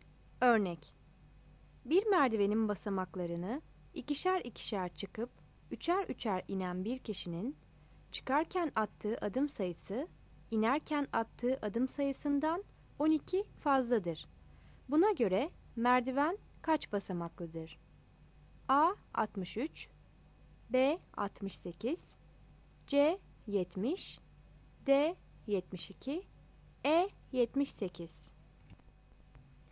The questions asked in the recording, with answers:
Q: Buna göre merdiven kaç basamaklıdır?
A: Yanıt D'dir.